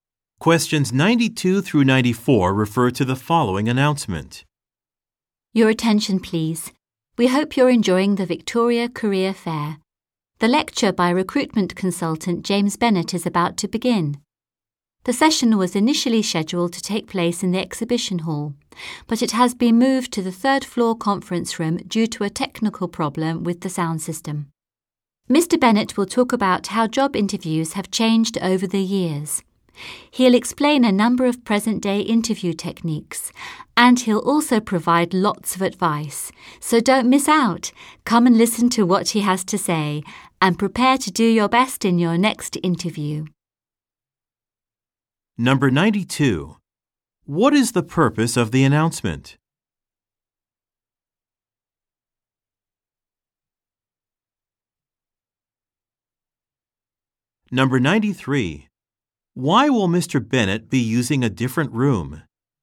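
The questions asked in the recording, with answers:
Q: What is the purpose of the announcement?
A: To announce a lecture is starting in a new location

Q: Why will Mr. Bennett be using a different room?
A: A technical problem with the sound system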